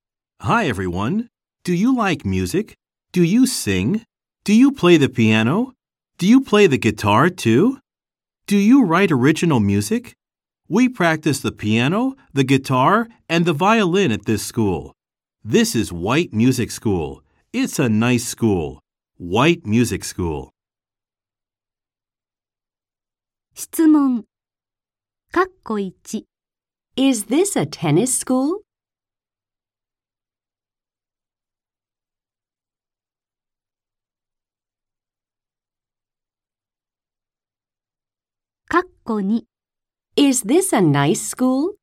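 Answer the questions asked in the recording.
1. No, it isn't.
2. Yes, it is.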